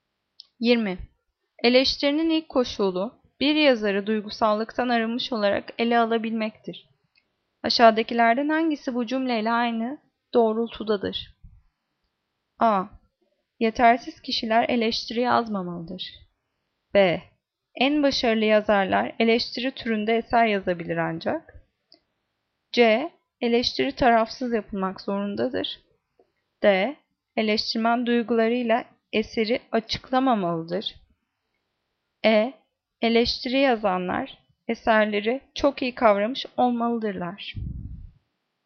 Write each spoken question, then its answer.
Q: Aşağıdakilerden hangisi bu cümleyle aynı doğrultudadır?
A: Cevap C. Eleştiri tarafsız yapılmak zorundadır.